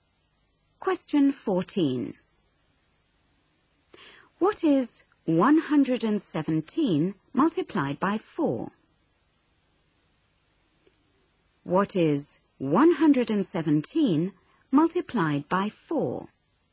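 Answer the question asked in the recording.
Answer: 468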